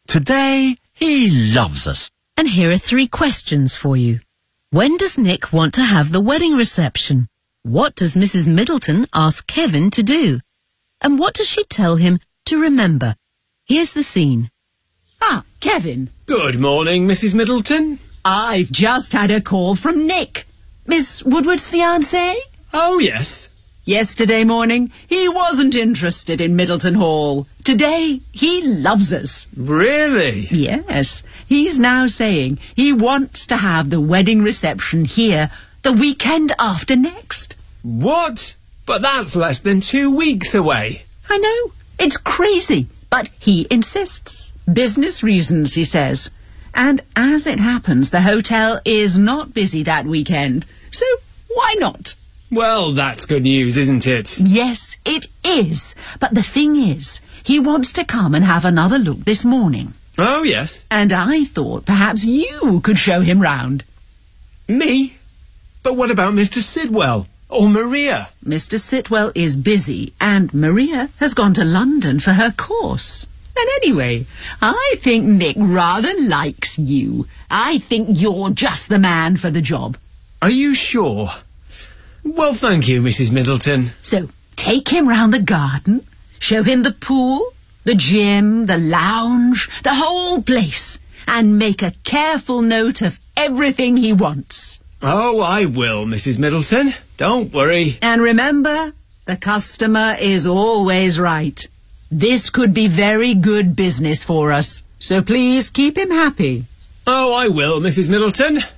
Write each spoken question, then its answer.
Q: When does Nick want to have the wedding reception?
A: He wants to have the wedding reception here the weekend after next.

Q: What does Mrs. Middleton ask Kevin to do?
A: I thought perhaps you could show him round.